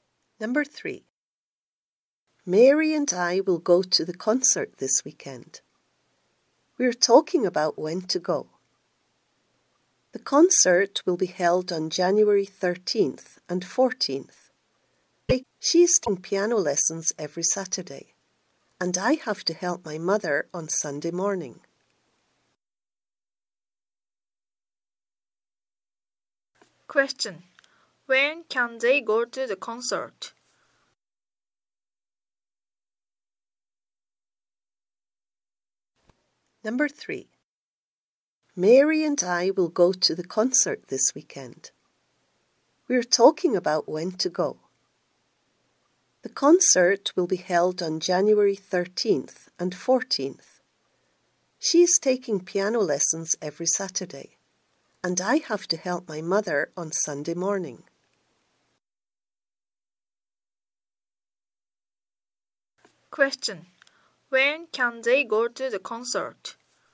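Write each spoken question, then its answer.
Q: When can they go to the concert?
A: On Sunday afternoon (January 14th)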